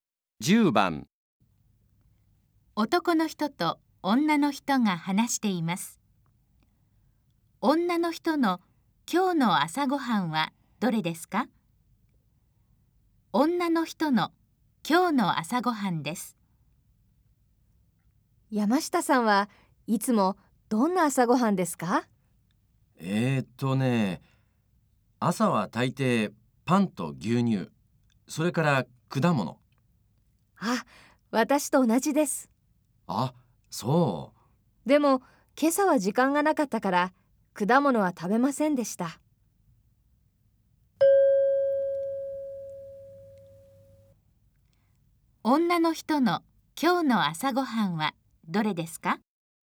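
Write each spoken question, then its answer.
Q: 女の人の今日の朝ごはんはどれですか?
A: パンと牛乳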